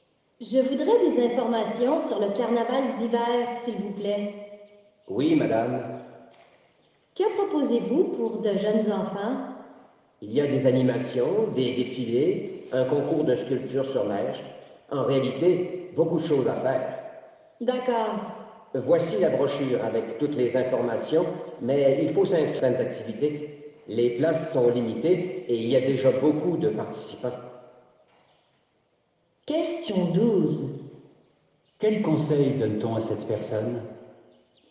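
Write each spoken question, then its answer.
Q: Quel conseil donne-t-on à cette personne?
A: De s'inscrire aux activités, car les places sont limitées.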